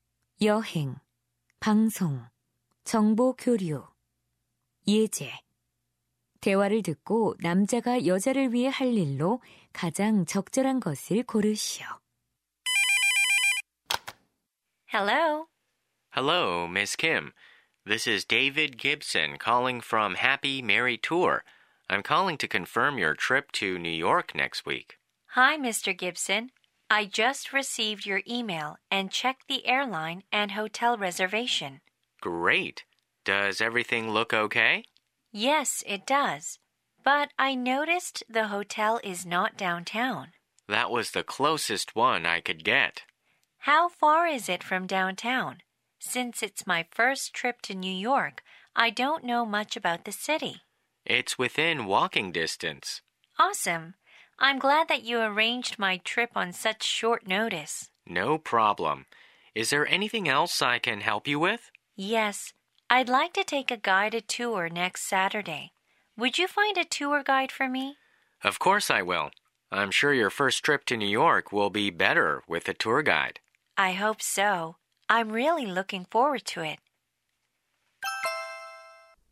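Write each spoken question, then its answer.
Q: 대화를 듣고 남자가 여자를 위해 할 일로 가장 적절한 것을 고르시오.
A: 여행 가이드 찾아 주기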